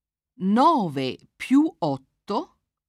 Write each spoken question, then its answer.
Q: 9 più 8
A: fa 17.